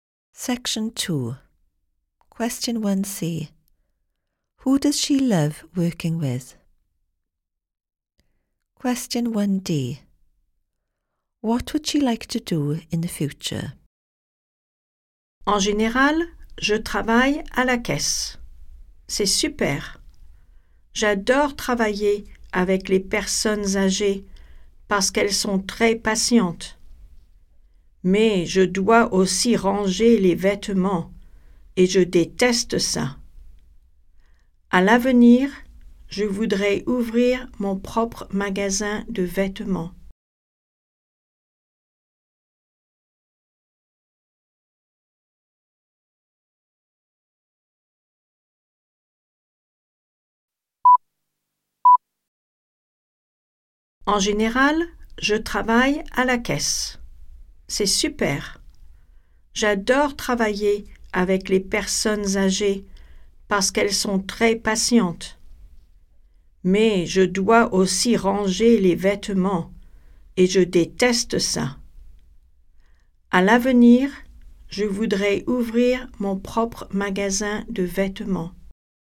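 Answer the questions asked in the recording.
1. Elderly people
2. Open her own clothes shop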